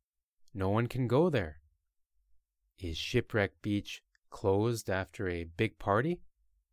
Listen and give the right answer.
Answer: No, Shipwreck Beach isn't closed after a big party.